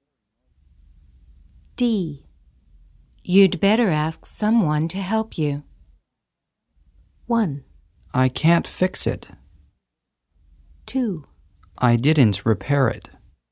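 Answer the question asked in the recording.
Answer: 1: I can't fix it.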